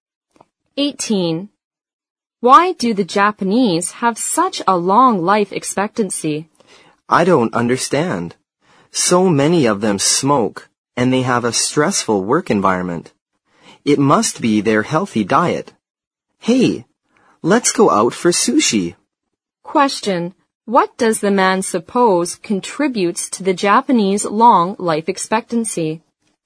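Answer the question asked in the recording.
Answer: Their healthy diet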